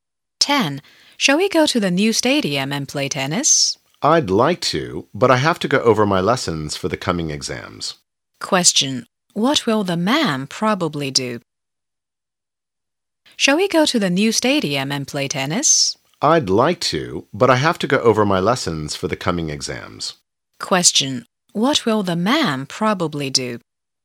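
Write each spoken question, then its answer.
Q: What will the man probably do?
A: Go over his lessons for the coming exams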